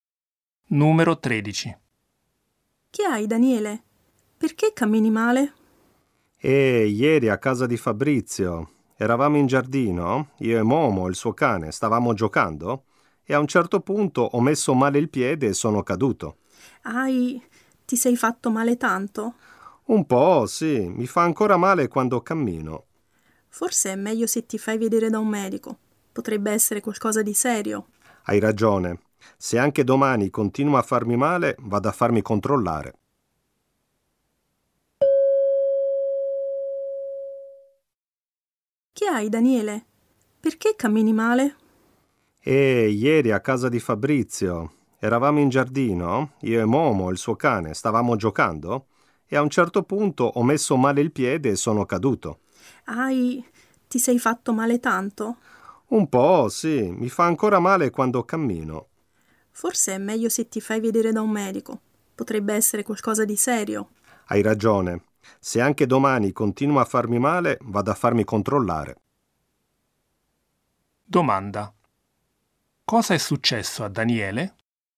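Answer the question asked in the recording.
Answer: È caduto mentre giocava con il cane e si è fatto male al piede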